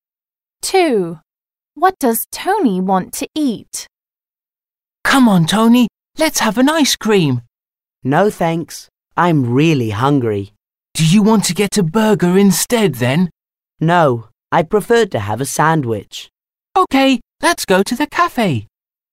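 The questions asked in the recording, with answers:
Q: What does Tony want to eat?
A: A sandwich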